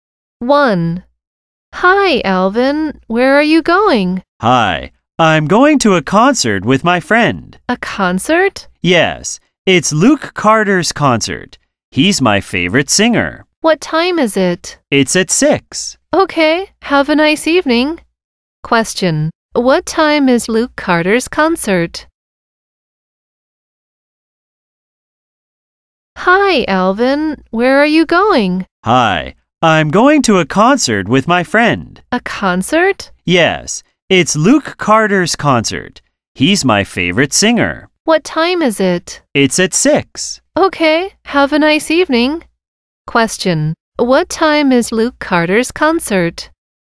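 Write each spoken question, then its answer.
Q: What time is Luke Carter's concert?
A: At 6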